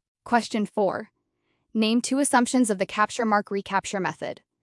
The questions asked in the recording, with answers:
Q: Name 2 assumptions of the capture mark recapture method.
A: Any 2 of no migration, no births or deaths between captures, marking does not affect survival, marked individuals mix randomly.